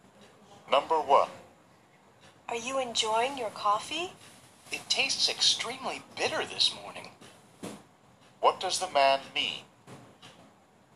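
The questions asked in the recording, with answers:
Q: What does the man mean?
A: He doesn't like the coffee because it is very bitter.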